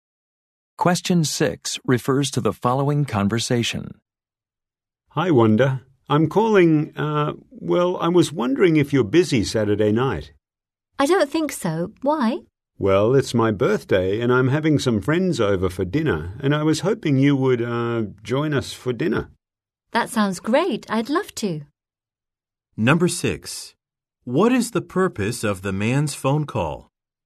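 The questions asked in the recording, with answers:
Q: What is the purpose of the man's phone call?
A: To invite Wanda to his birthday dinner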